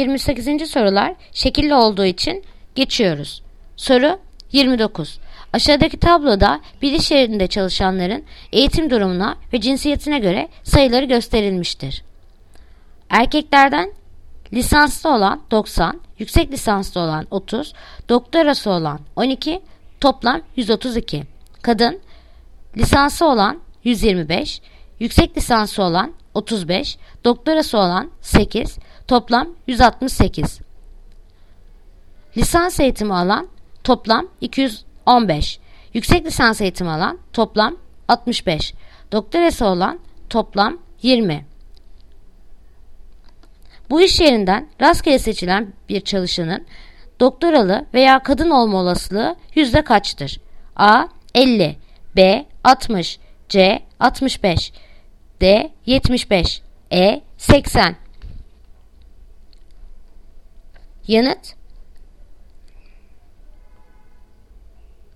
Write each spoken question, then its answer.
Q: Bu iş yerinden rastgele seçilen bir çalışanın doktoralı veya kadın olma olasılığı yüzde kaçtır?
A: Bursa 60.